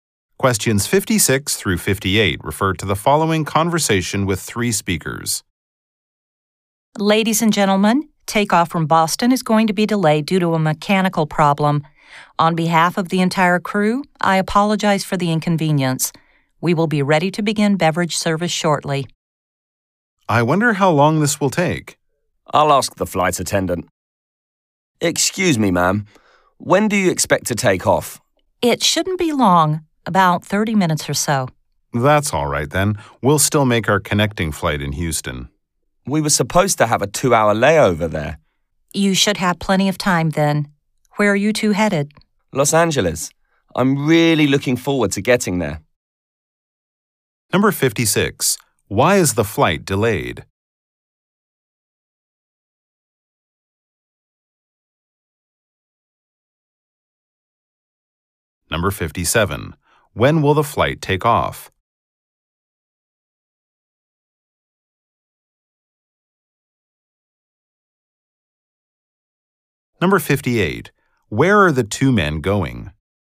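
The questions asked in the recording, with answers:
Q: Why is the flight delayed?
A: Because of a mechanical problem.

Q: When will the flight take off?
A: In about 30 minutes.

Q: Where are the two men going?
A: Los Angeles.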